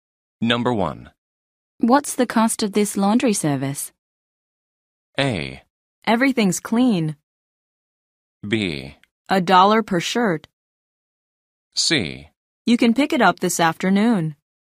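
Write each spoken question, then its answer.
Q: What's the cost of this laundry service?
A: B: $1 per shirt.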